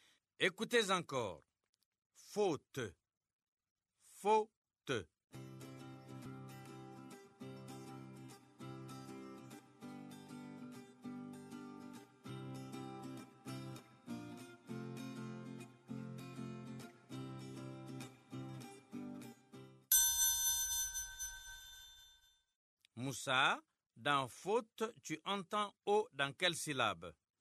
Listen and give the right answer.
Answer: Monsieur, dans faux, la première syllabe.